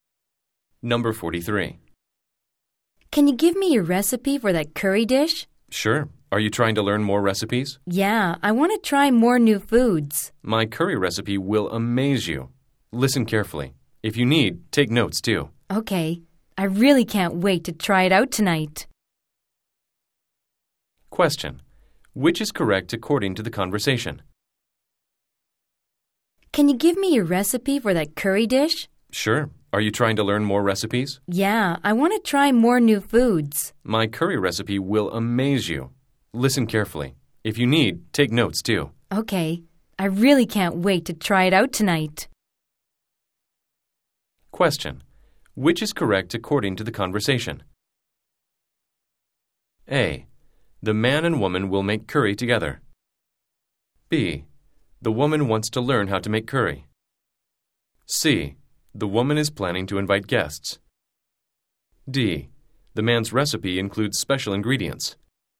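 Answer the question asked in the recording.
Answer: B: The woman wants to learn how to make curry.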